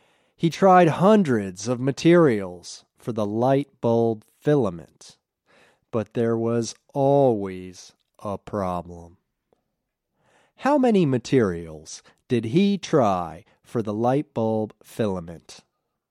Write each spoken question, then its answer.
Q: How many materials did he try for the light bulb filament?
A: He tried hundreds of materials for the light bulb filament.